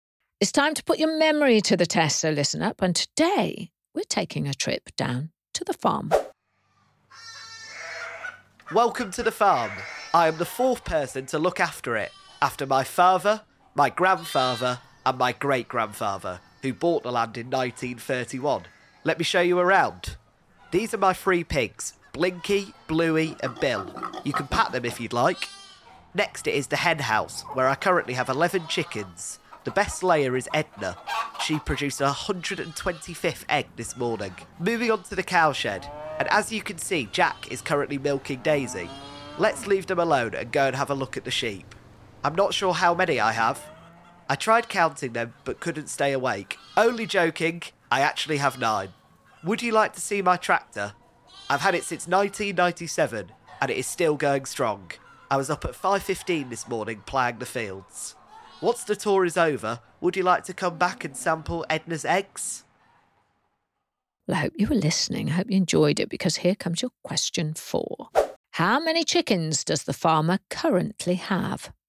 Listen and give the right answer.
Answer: The answer was the farmer has 11 chickens.